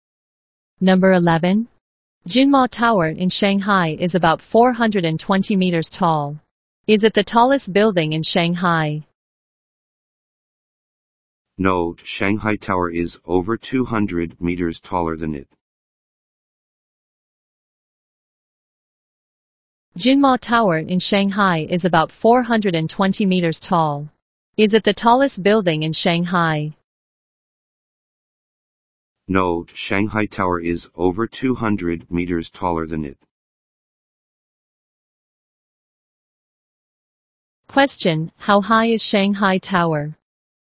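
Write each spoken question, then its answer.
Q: Question, how high is Shanghai Tower?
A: Over 620 meters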